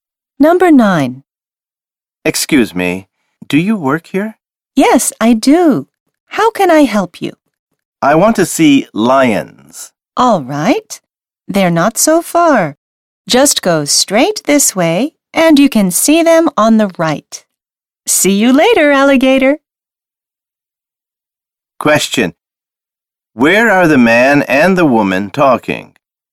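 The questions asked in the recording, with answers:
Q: Where are the man and the woman talking?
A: At a zoo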